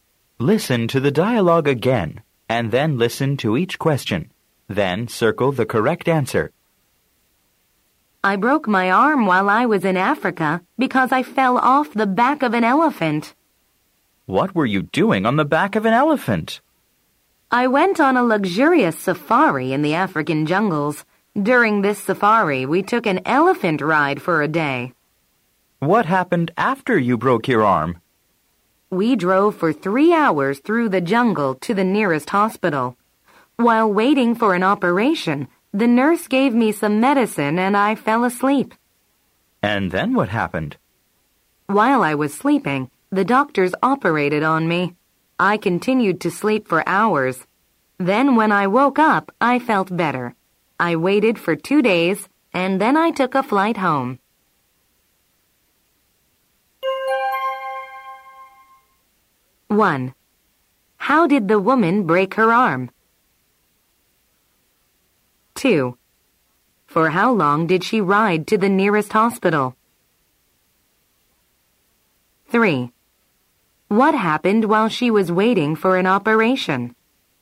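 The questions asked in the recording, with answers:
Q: How did the woman break her arm?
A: She fell off the back of an elephant.

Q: For how long did she ride to the nearest hospital?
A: 3 hours

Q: What happened while she was waiting for an operation?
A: The nurse gave her some medicine and she fell asleep.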